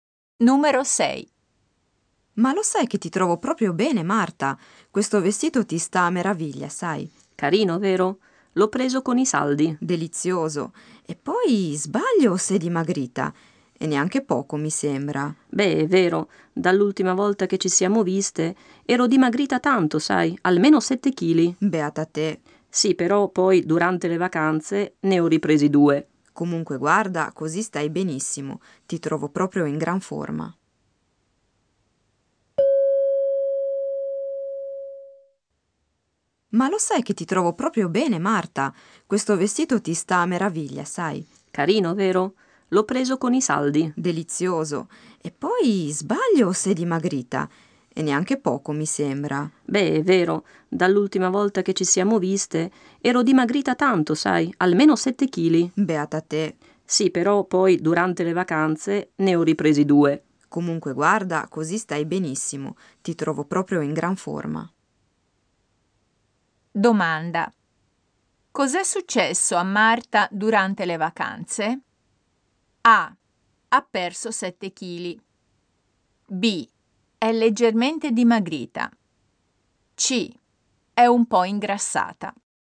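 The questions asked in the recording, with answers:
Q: Cos'è successo a Marta durante le vacanze?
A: C: È un po' ingrassata.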